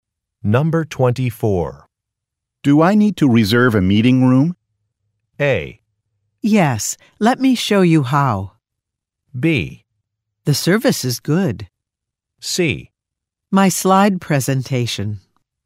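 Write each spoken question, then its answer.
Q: Do I need to reserve a meeting room?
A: A: Yes, let me show you how.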